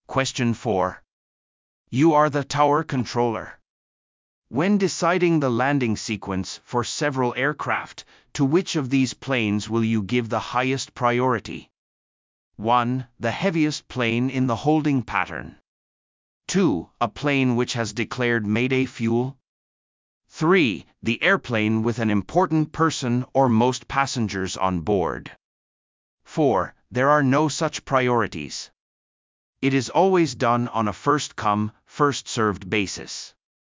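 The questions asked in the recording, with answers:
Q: When deciding the landing sequence for several aircraft, to which of these planes will you give the highest priority?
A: 2: A plane which has declared mayday fuel.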